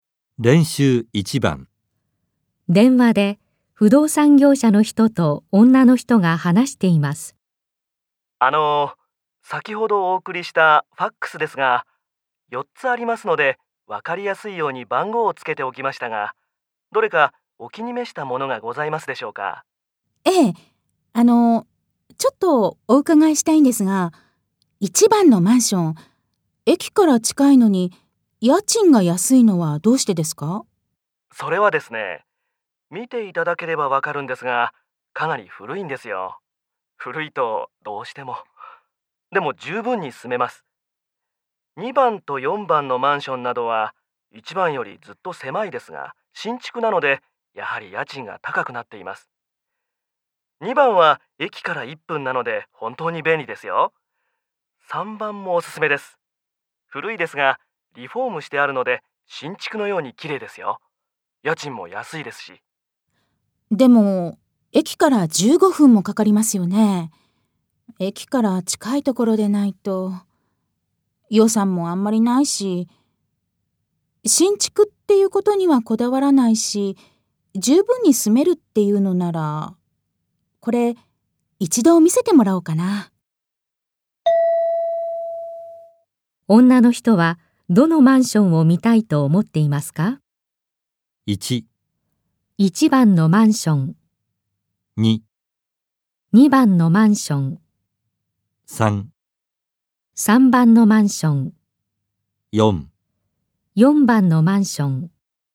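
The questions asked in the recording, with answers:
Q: 女の人はどのマンションを見たいと思っていますか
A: 1: 1番のマンション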